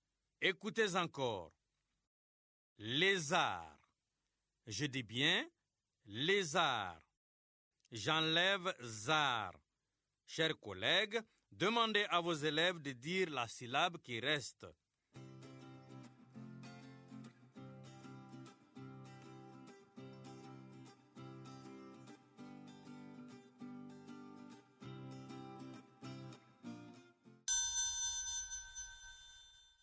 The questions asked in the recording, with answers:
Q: Lézard. Je dis bien lézard. J'enlève zar. Chers collègues, demandez à vos élèves de dire la syllabe qui reste.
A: Il reste lait.